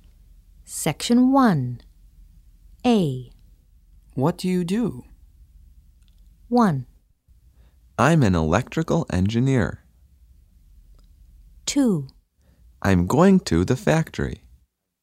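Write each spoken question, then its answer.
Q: What do you do?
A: 1: I'm an electrical engineer.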